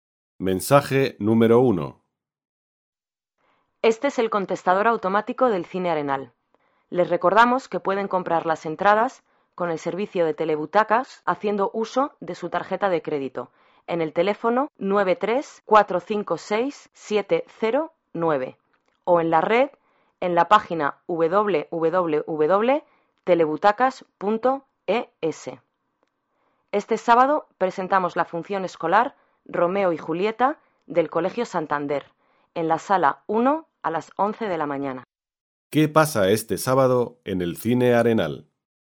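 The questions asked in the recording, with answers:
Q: ¿Qué pasa este sábado en el Cine Arenal?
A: Hay una función escolar de Romeo y Julieta del Colegio Santander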